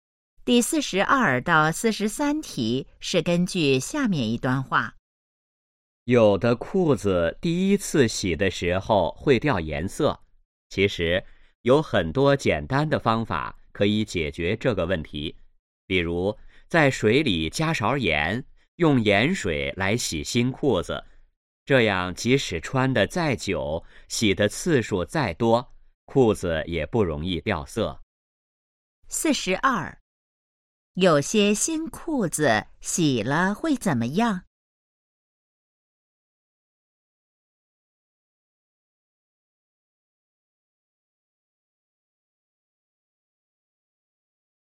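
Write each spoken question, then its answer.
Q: 有些新裤子洗了会怎么样?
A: 掉颜色

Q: 怎样解决这个问题?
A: 用盐水洗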